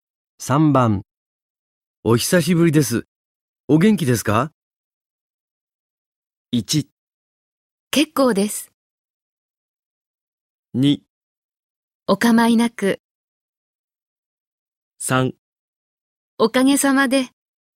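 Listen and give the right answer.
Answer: 3: おかげさまで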